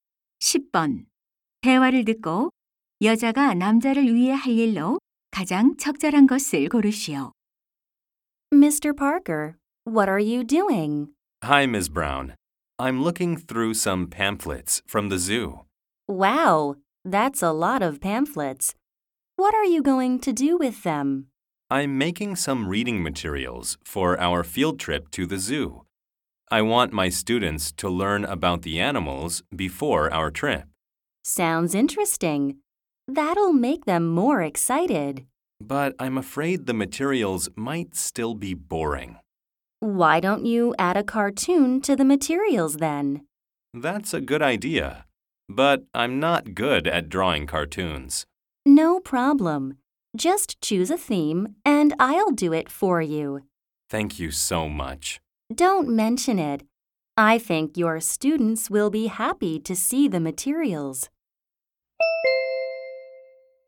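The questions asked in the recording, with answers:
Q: 대화를 듣고 여자가 남자를 위해 할 일로 가장 적절한 것을 고르시오.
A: 자료에 넣을 만화 그리기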